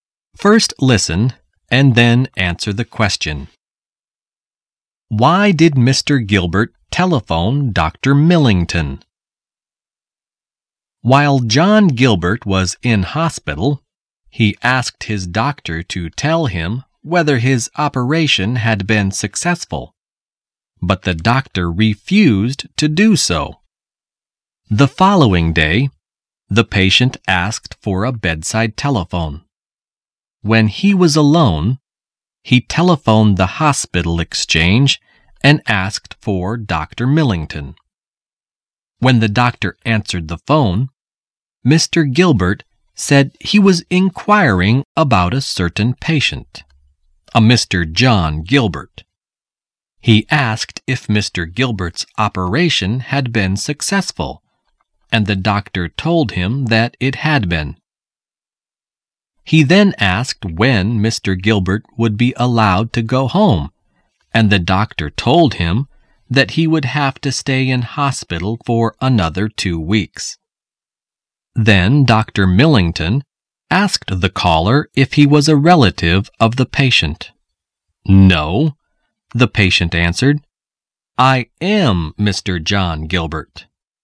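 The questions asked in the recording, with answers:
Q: Why did Mr. Gilbert telephone Dr. Millington?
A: To find out whether his operation had been successful, since the doctor had refused to tell him.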